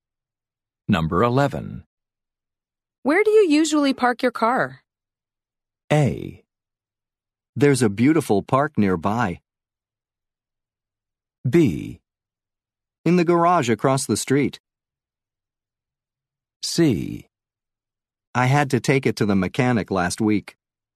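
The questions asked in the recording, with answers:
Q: Where do you usually park your car?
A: B: In the garage across the street.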